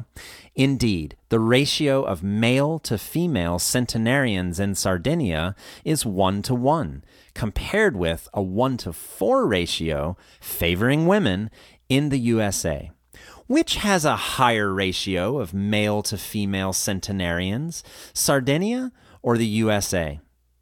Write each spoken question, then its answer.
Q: Which has a higher ratio of male to female centenarians, Sardinia or the USA?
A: Sardinia has a higher ratio of male to female centenarians than the USA does.